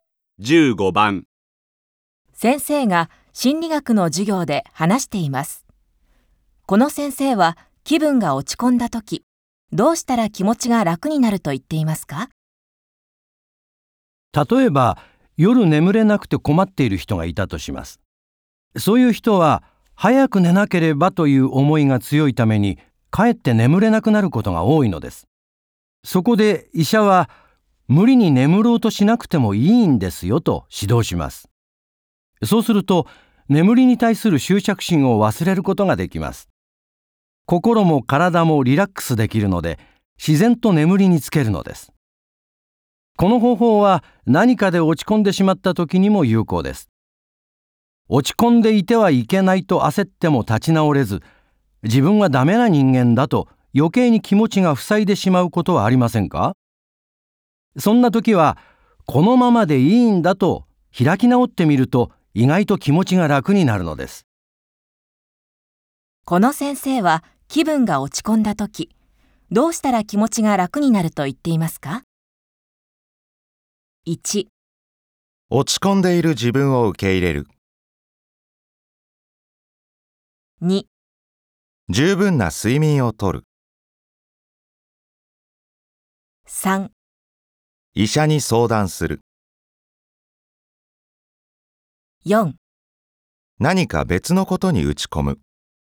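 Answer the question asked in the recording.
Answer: 1: 落ち込んでいる自分を受け入れる。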